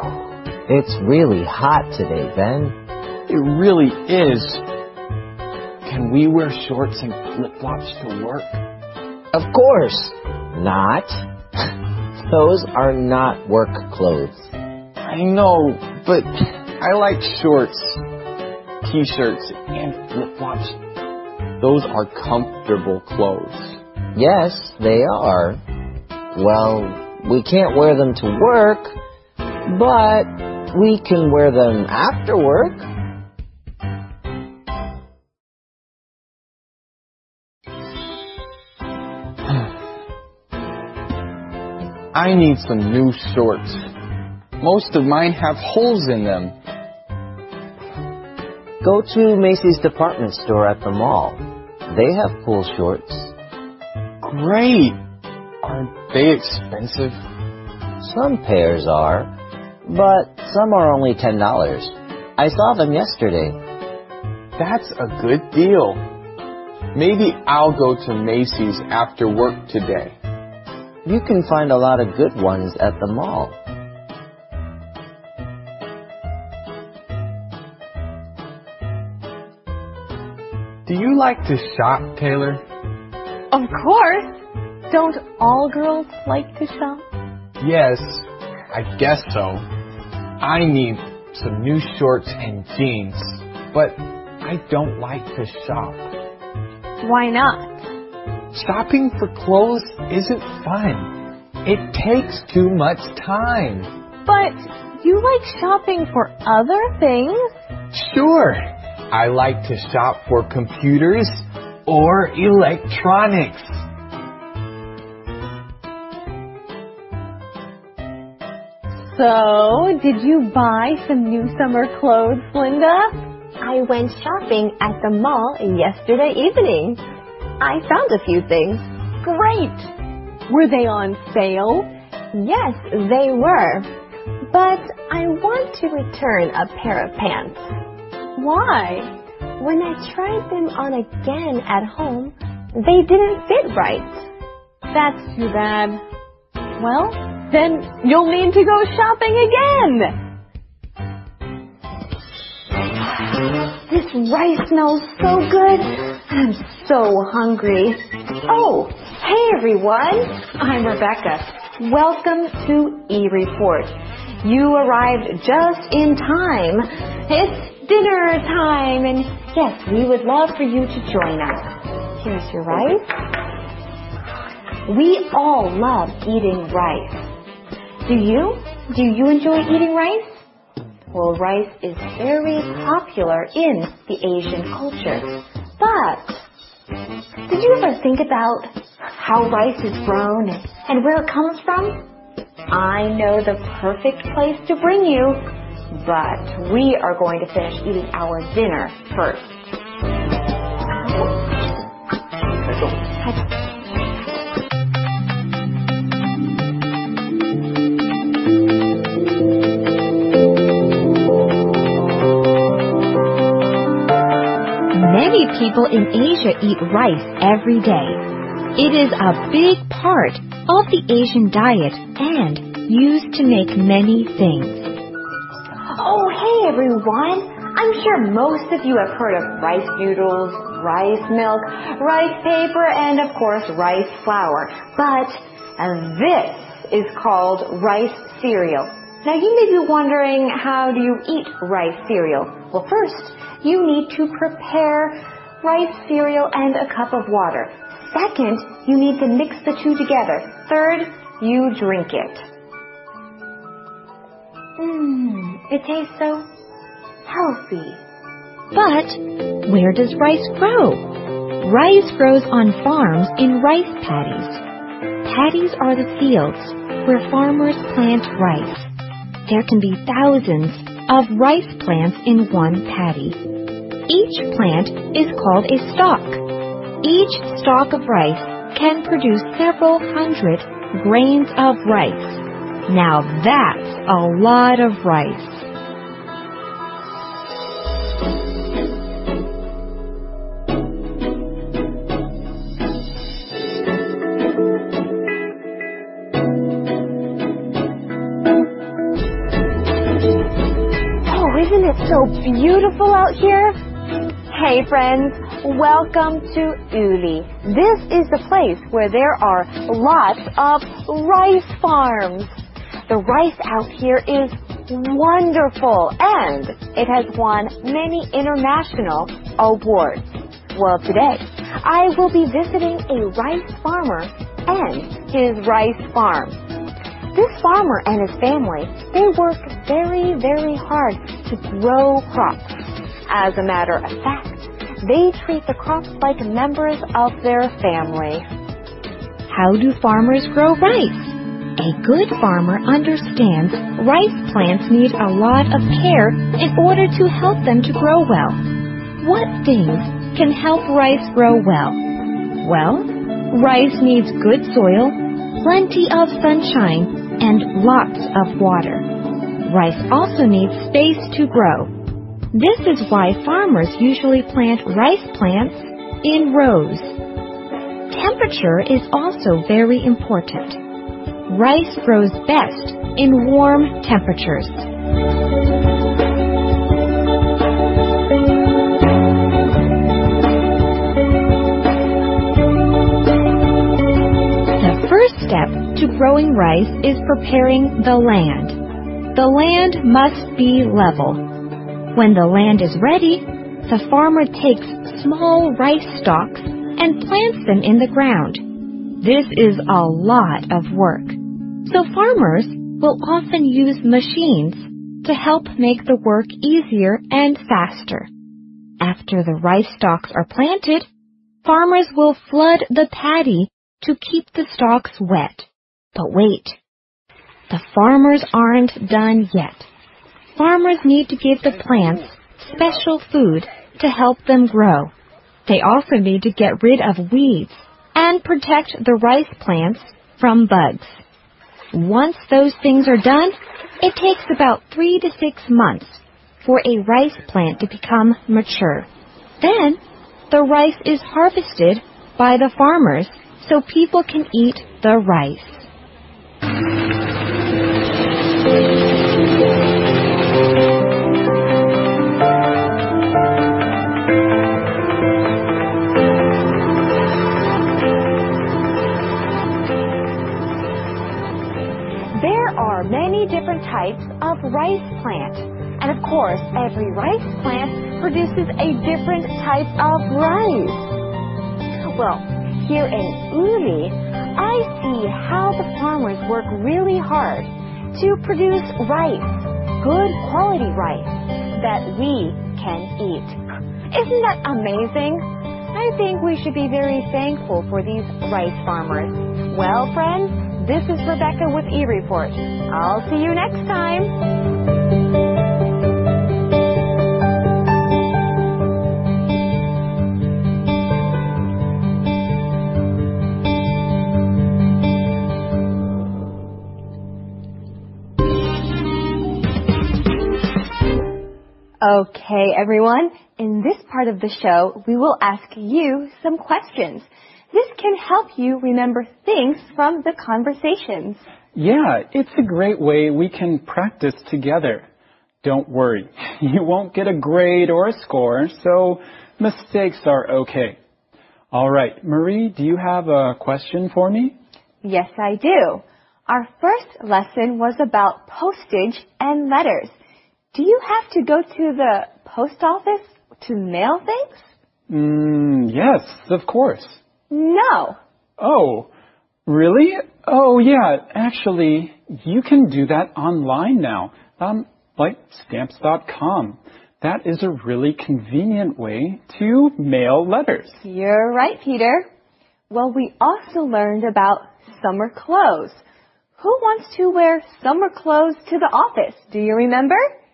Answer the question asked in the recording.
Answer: I remember. Ben wants to wear his flip-flops and his shorts to the office.